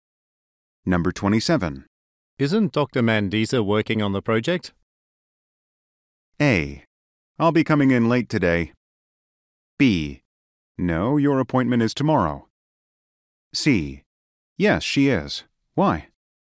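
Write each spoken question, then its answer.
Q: Isn't Dr. Mandisa working on the project?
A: C: Yes, she is. Why?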